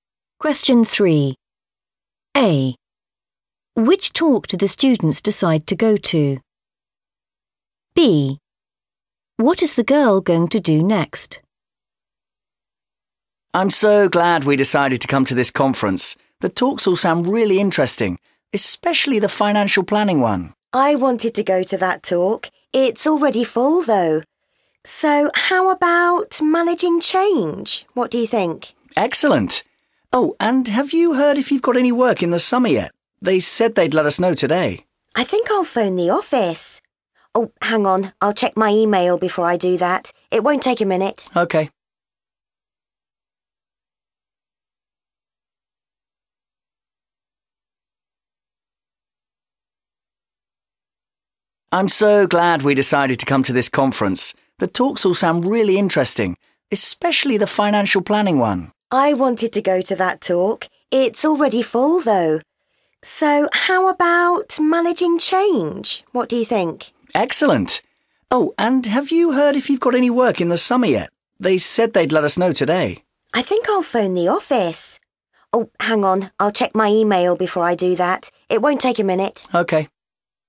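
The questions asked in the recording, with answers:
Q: Which talk do the students decide to go to?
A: managing change

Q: What is the girl going to do next?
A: check her email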